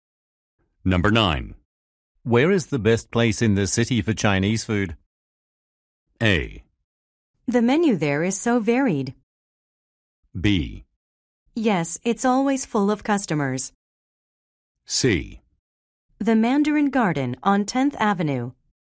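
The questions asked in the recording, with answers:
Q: Where is the best place in the city for Chinese food?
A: C: The Mandarin Garden on 10th Avenue.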